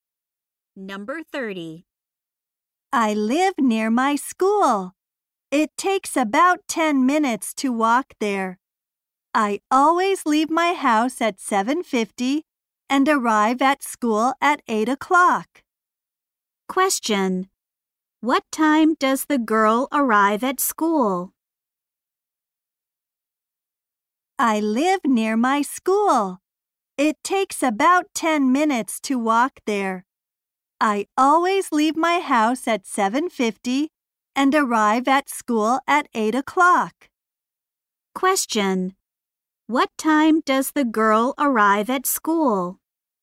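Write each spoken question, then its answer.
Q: Question. What time does the girl arrive at school?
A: At 8 o'clock.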